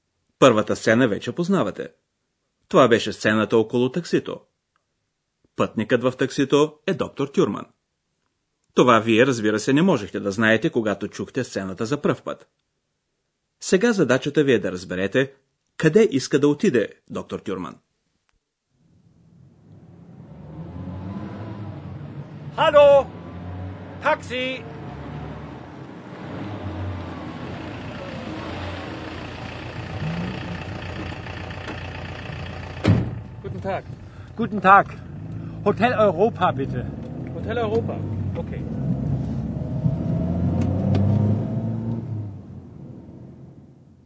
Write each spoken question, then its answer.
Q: Сега задачата ви е да разберете къде иска да отиде доктор Тюрман.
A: Доктор Тюрман поиска от шофьора на таксито да го откара в Хотел Европа.